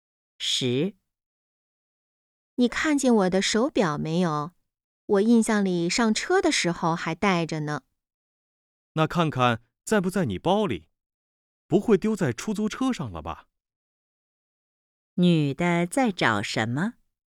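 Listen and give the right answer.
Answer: 手表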